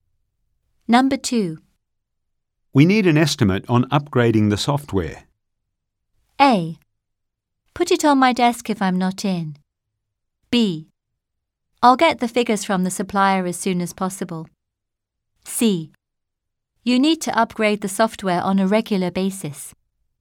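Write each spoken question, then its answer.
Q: We need an estimate on upgrading the software.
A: B: I'll get the figures from the supplier as soon as possible.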